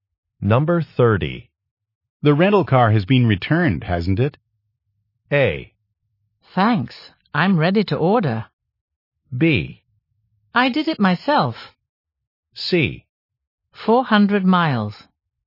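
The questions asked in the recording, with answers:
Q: The rental car has been returned, hasn't it?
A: B: I did it myself.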